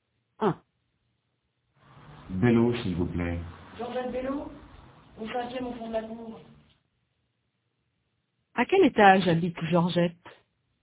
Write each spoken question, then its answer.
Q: À quel étage habite Georgette?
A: Au 5e, au 5e étage.